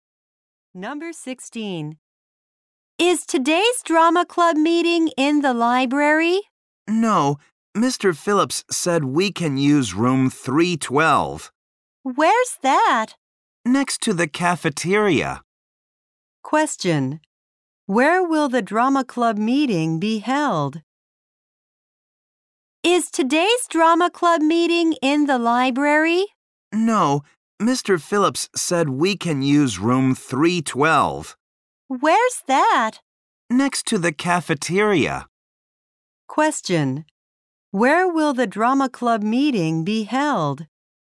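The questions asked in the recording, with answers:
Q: Where will the drama club meeting be held?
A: In room 312.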